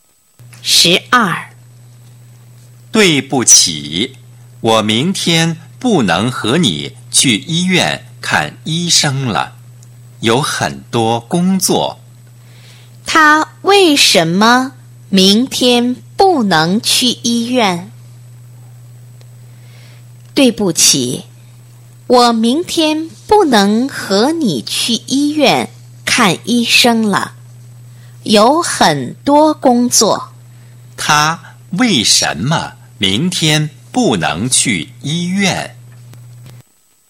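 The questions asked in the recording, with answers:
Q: 他为什么明天不能去医院?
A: 有很多工作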